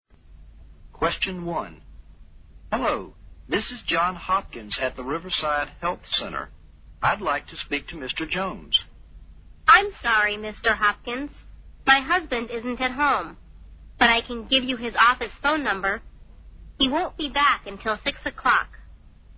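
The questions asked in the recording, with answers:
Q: Where does Mrs. Jones think her husband is now?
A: At his office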